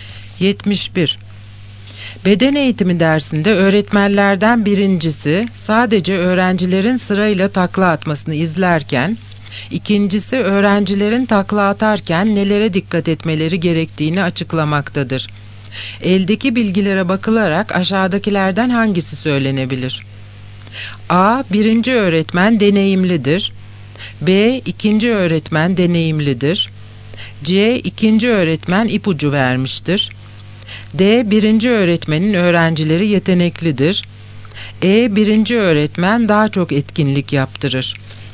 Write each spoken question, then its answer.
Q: Eldeki bilgilere bakılarak aşağıdakilerden hangisi söylenebilir?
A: Yanıt C. İkinci öğretmen ipucu vermiştir.